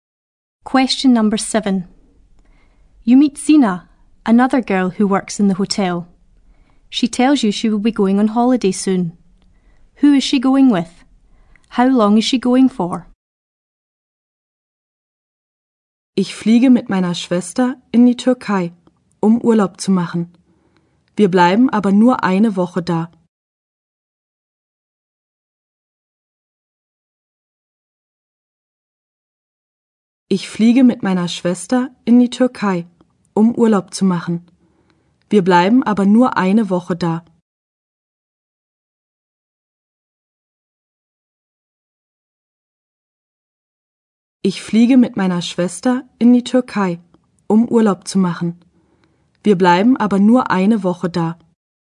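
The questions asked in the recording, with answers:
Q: Who is she going with?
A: Her sister

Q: How long is she going for?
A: Only one week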